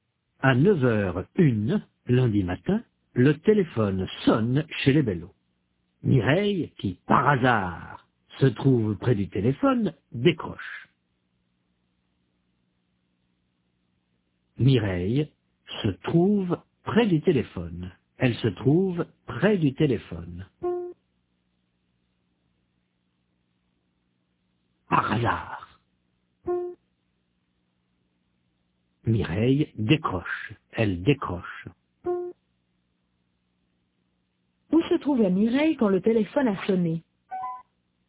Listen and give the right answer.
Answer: Près du téléphone.